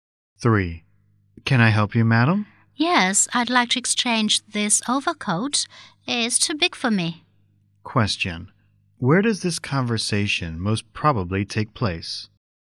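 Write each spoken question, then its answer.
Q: Where does this conversation most probably take place?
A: In a clothing store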